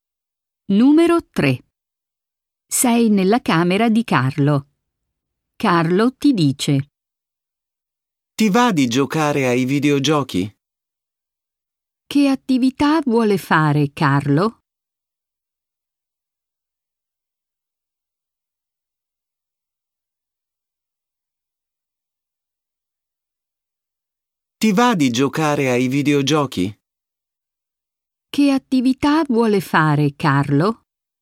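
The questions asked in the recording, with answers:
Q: Che attività vuole fare Carlo?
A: Giocare ai videogiochi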